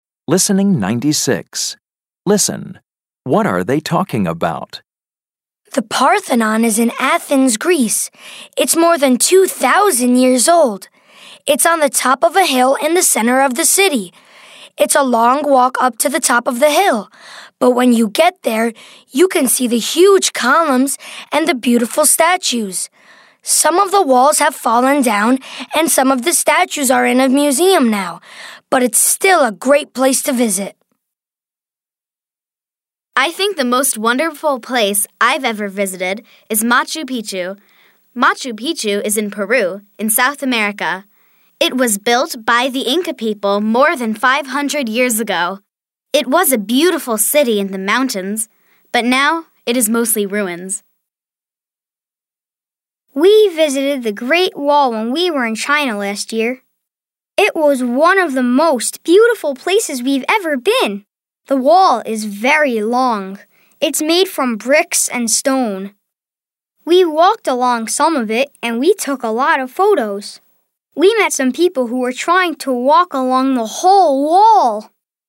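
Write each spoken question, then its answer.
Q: What are they talking about?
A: Famous old places they have visited (the Parthenon, Machu Picchu, the Great Wall)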